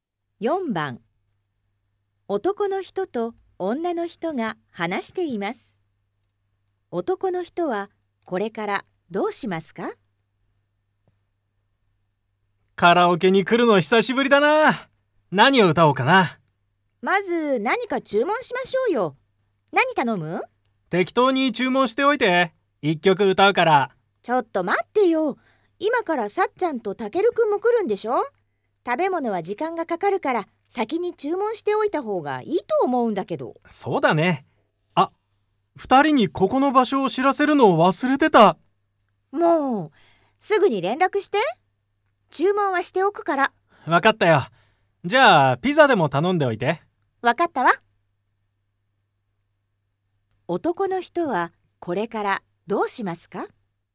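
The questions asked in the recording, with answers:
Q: 男の人はこれからどうしますか?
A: 二人(さっちゃんとたけるくん)にカラオケの場所を連絡する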